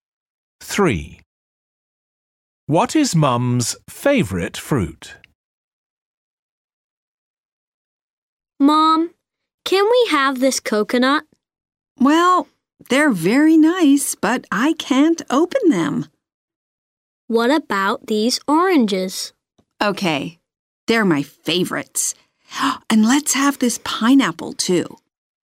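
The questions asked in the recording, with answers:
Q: What is Mum's favourite fruit?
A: Oranges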